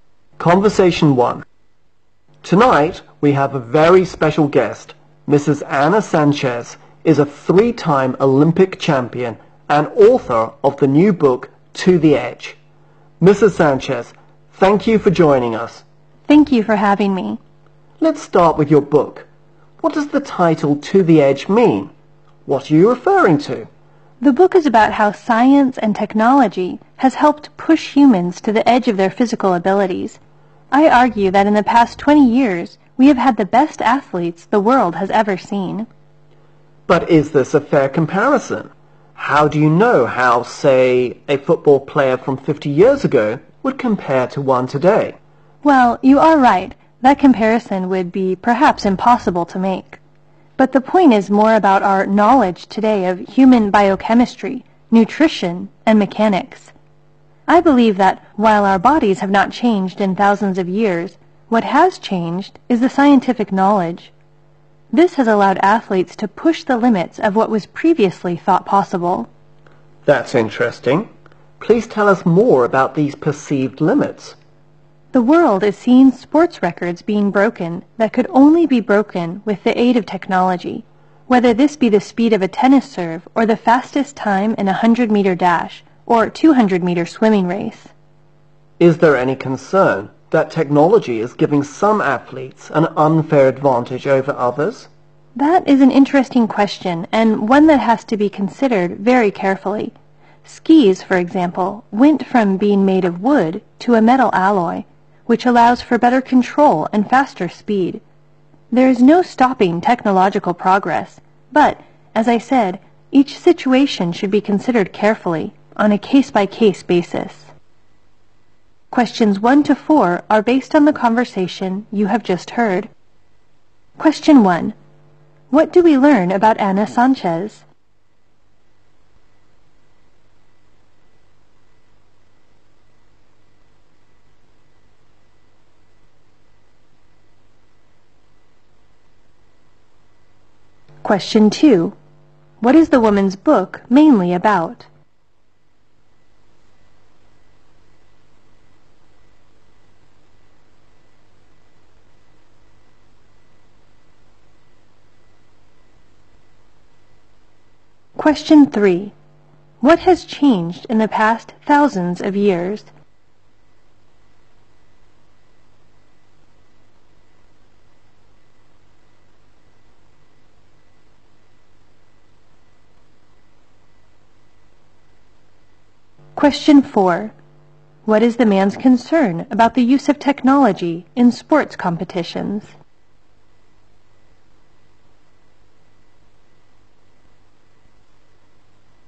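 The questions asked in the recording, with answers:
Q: What do we learn about Anna Sanchez?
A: She is a three-time Olympic champion and author of the new book To the Edge

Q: What is the woman's book mainly about?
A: How science and technology have helped push humans to the edge of their physical abilities

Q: What has changed in the past thousands of years?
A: Scientific knowledge (not our bodies)

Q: What is the man's concern about the use of technology in sports competitions?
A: It may give some athletes an unfair advantage over others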